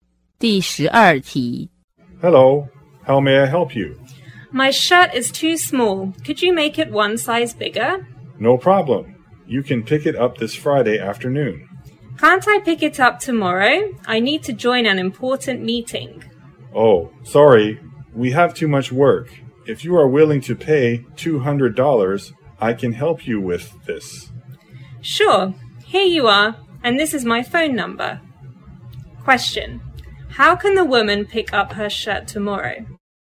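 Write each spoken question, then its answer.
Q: How can the woman pick up her shirt tomorrow?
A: By paying $200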